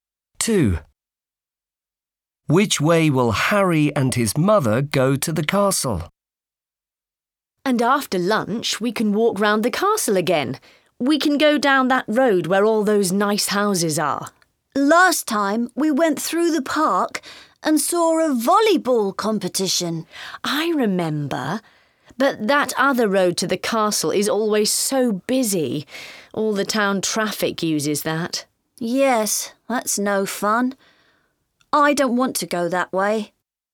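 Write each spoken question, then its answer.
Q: Which way will Harry and his mother go to the castle?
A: down the road with the nice houses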